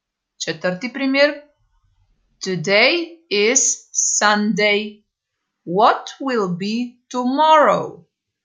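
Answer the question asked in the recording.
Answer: Monday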